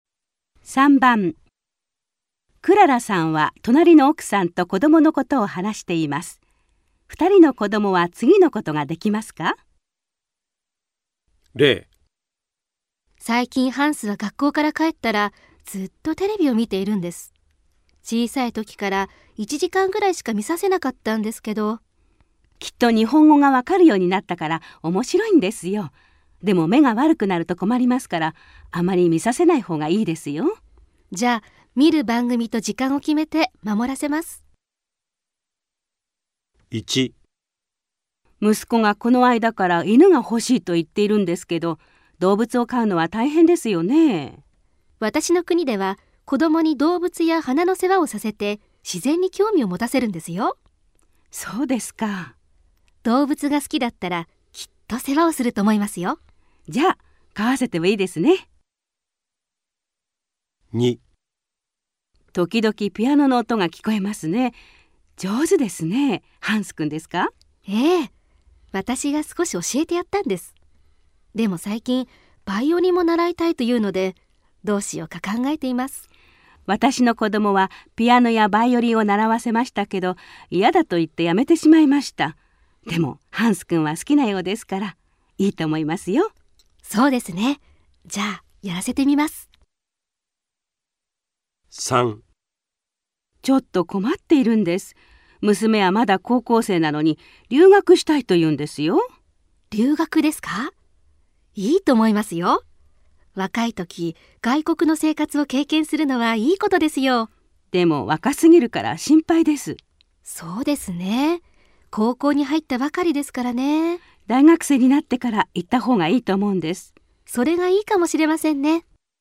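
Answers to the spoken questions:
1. できる(犬を飼える)
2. できる(バイオリンを習える)
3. できない(今は留学できない。大学生になってから)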